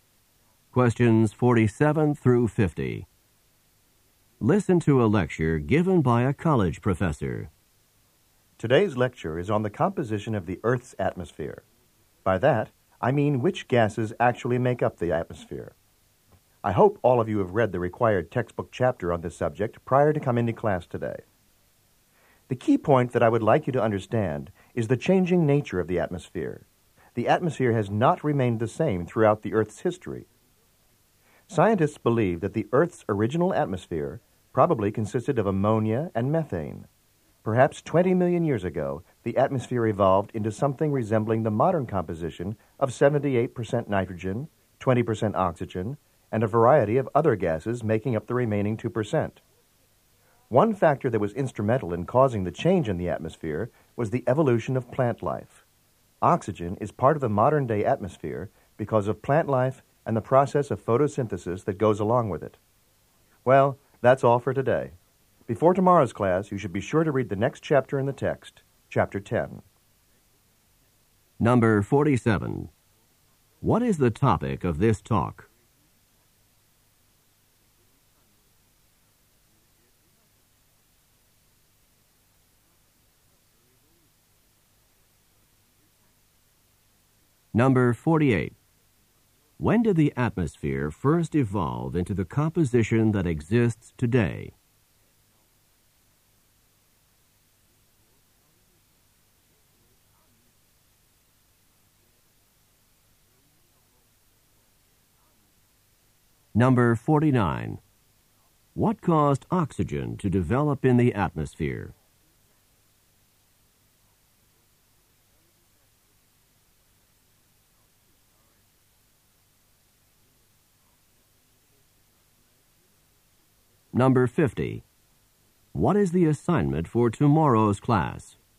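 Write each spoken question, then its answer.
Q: What is the topic of this talk?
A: The composition of the Earth's atmosphere

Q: When did the atmosphere first evolve into the composition that exists today?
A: About 20 million years ago

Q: What caused oxygen to develop in the atmosphere?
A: Plant life and photosynthesis

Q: What is the assignment for tomorrow's class?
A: Read chapter 10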